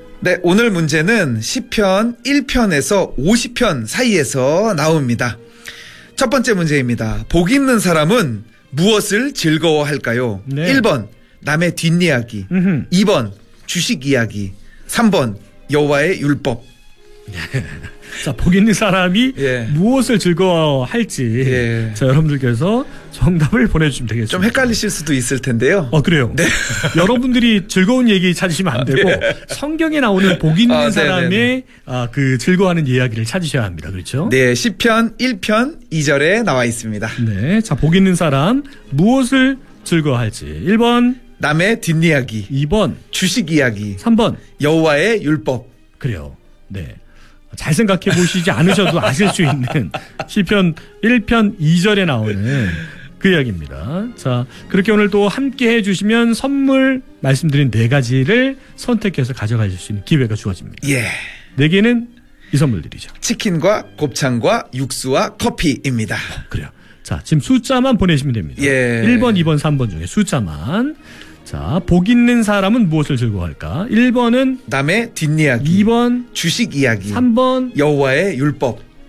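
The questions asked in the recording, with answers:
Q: 복 있는 사람은 무엇을 즐거워할까요?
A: 3: 여호와의 율법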